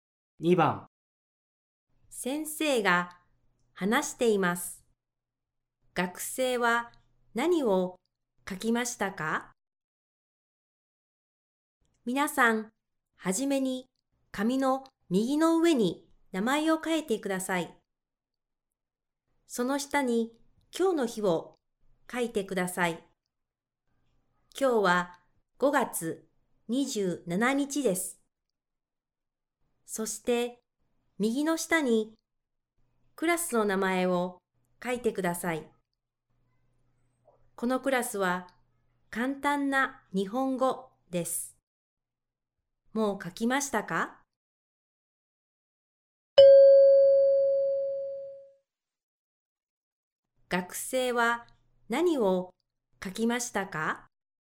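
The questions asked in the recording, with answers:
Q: 学生は何を書きましたか?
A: 名前と今日の日(5月27日)とクラスの名前(簡単な日本語)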